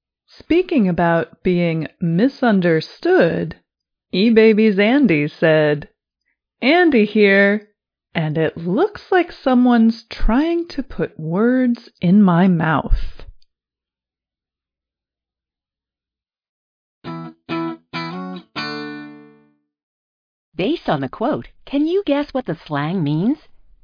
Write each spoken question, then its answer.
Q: Based on the quote, can you guess what the slang means?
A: Put words in one's mouth is an expression meaning say that a person said something which they did not say.